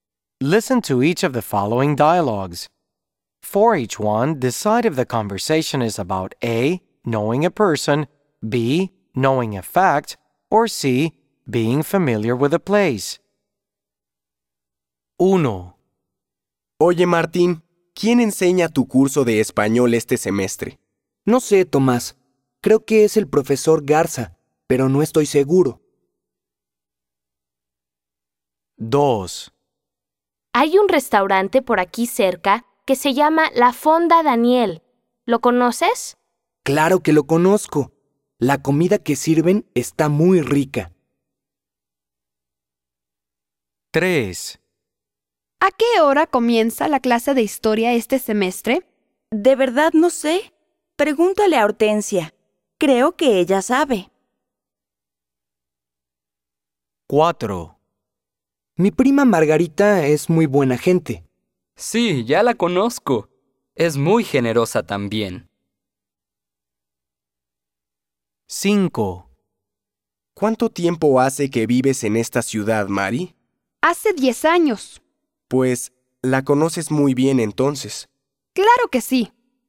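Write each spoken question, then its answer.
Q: For each one, decide if the conversation is about A, knowing a person, B, knowing a fact, or C, being familiar with a place.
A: C: being familiar with a place

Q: For each one, decide if the conversation is about A, knowing a person, B, knowing a fact, or C, being familiar with a place.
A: B: knowing a fact

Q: For each one, decide if the conversation is about A, knowing a person, B, knowing a fact, or C, being familiar with a place.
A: A: knowing a person

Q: For each one, decide if the conversation is about A, knowing a person, B, knowing a fact, or C, being familiar with a place.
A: C: being familiar with a place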